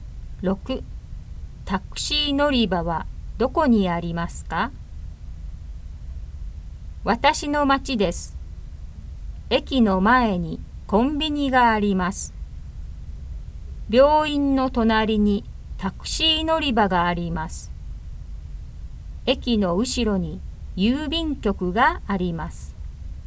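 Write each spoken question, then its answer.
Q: タクシー乗り場はどこにありますか?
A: 病院の隣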